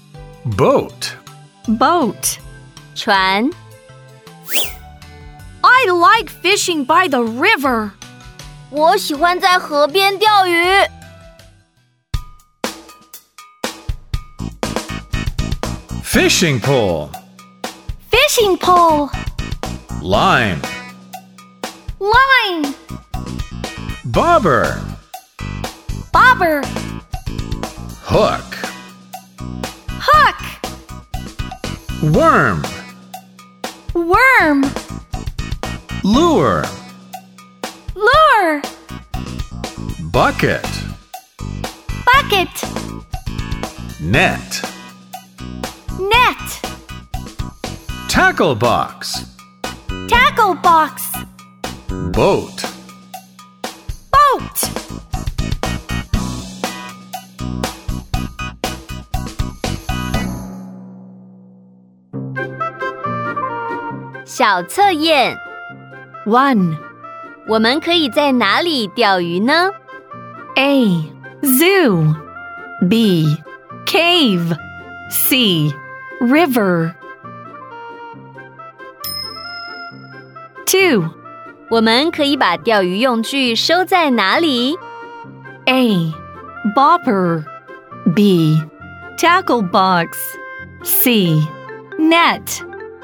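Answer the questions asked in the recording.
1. C: River
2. B: Tackle box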